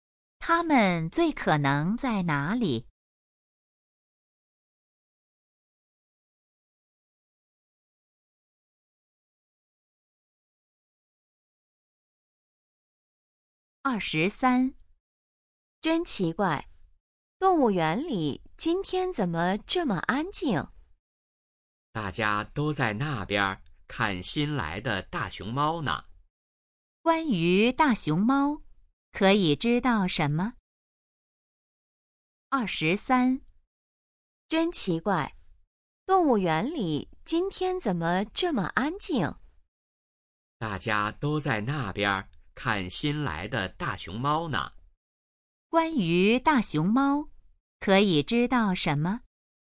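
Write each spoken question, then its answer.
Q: 关于大熊猫,可以知道什么?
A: 是新来的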